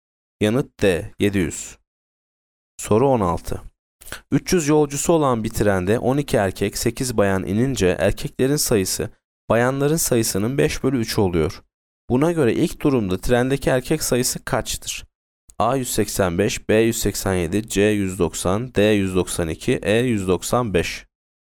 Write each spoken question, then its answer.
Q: Buna göre ilk durumda trendeki erkek sayısı kaçtır?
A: Yanıt B 187.